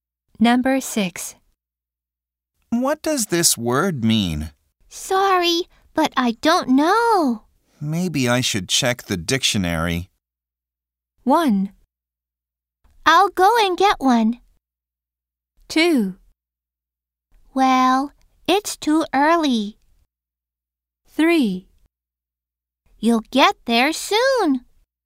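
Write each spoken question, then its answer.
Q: Maybe I should check the dictionary.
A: 1: I'll go and get one.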